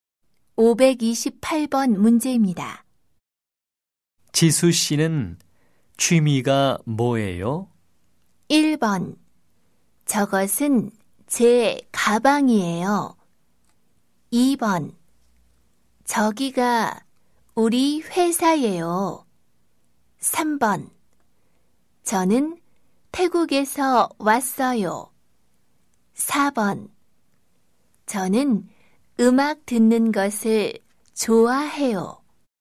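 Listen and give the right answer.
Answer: 4: 저는 음악 듣는 것을 좋아해요.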